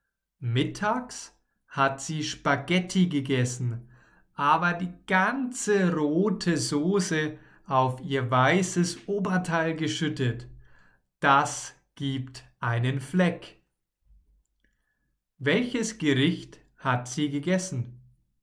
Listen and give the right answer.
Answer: Spaghetti. Sie hat Spaghetti gegessen.